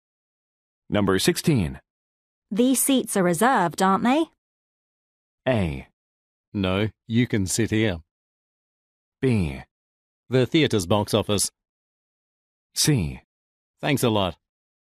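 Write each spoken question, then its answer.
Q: These seats are reserved, aren't they?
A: A: No, you can sit here.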